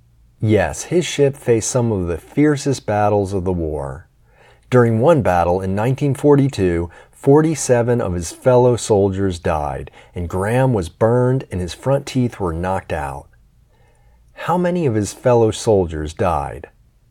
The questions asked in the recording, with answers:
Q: How many of his fellow soldiers died?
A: 47 of his fellow soldiers died.